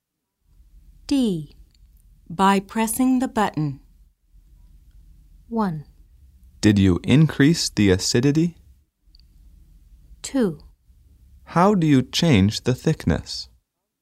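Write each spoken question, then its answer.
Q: By pressing the button.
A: 2: How do you change the thickness?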